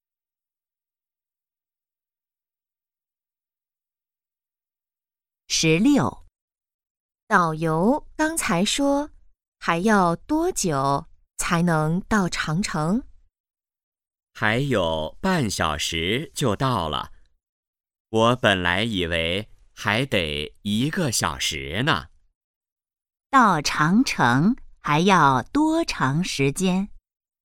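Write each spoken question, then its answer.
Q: 到长城还要多长时间?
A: 半小时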